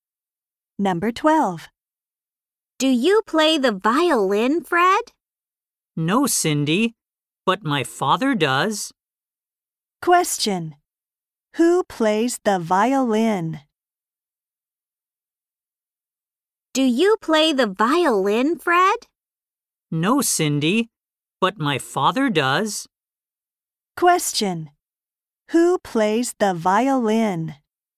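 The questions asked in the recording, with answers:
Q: Who plays the violin?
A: Fred's father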